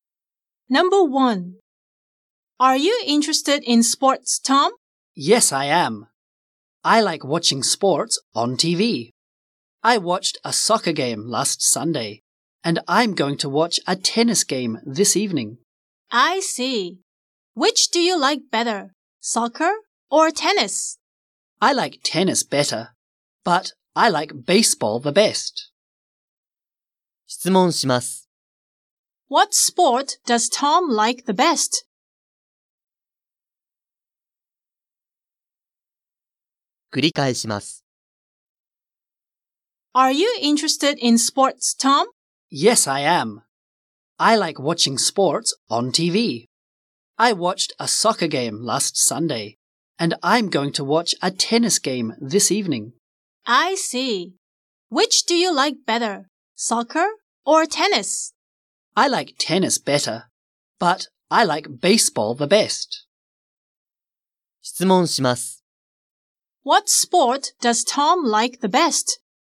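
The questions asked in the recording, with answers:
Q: What sport does Tom like the best?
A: Baseball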